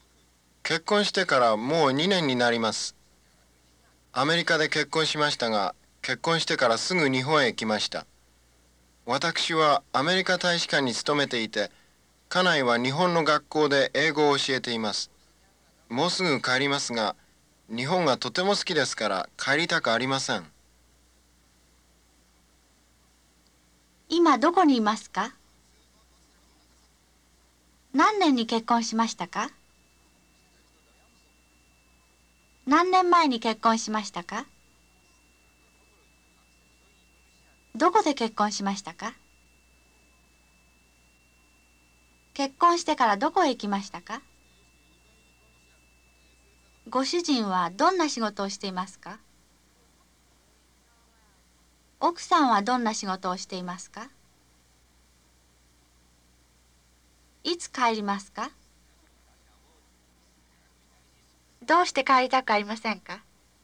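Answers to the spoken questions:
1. 日本
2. 2年前
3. アメリカ
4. 日本
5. アメリカ大使館に勤めています
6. 日本の学校で英語を教えています
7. もうすぐ帰ります。日本がとても好きだからです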